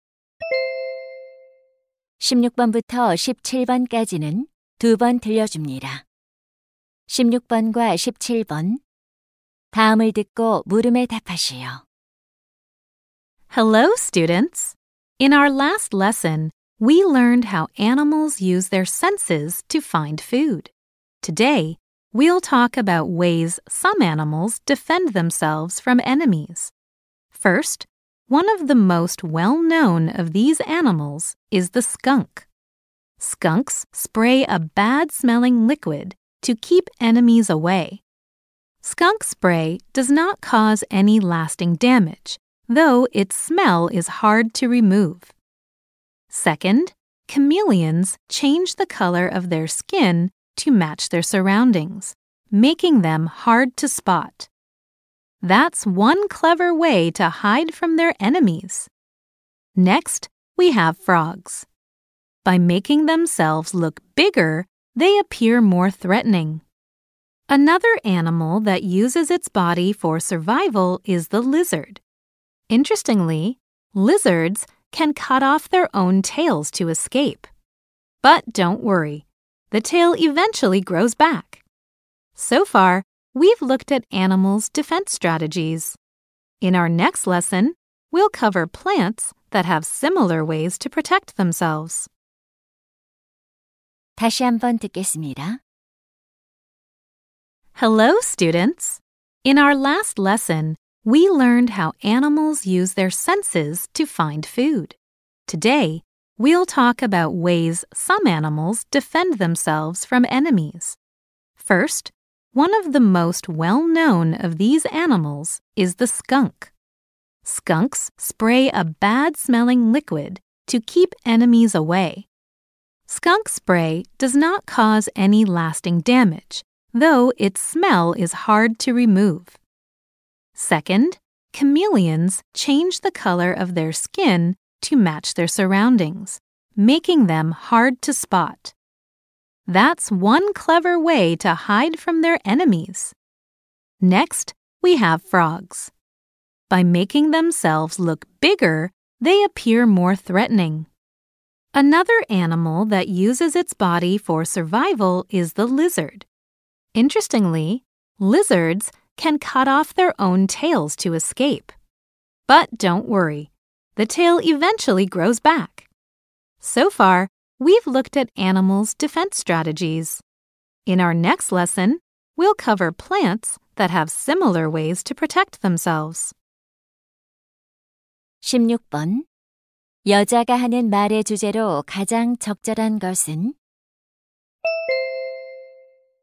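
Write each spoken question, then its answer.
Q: 여자가 하는 말의 주제로 가장 적절한 것은?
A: 동물들이 적으로부터 자신을 방어하는 방법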